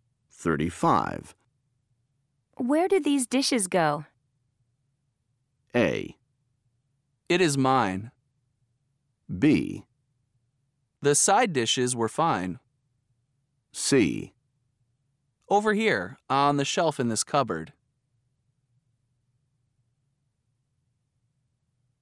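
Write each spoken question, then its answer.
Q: Where did these dishes go?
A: C: Over here, on the shelf in this cupboard.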